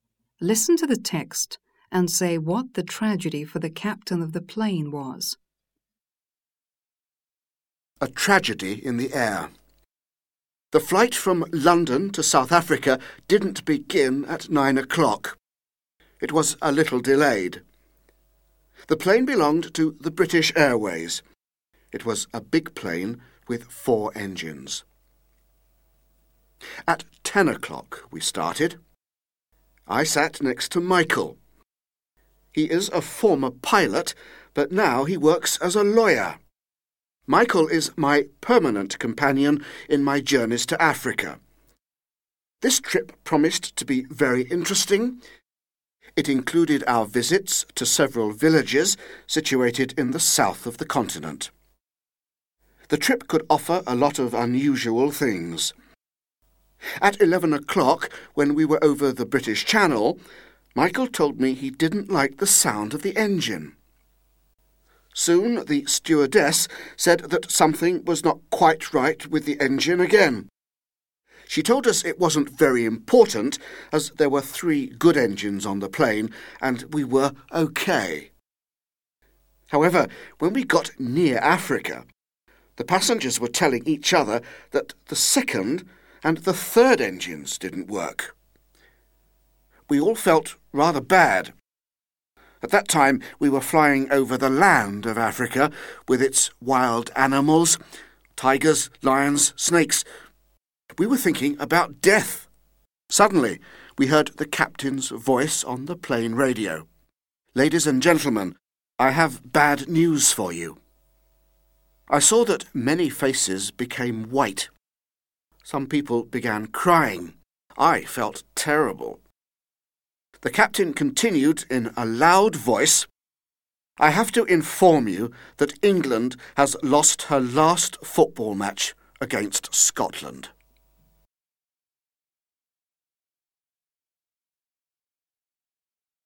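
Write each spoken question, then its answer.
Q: Listen to the text and say what the tragedy for the captain of the plane was.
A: England lost its last football match against Scotland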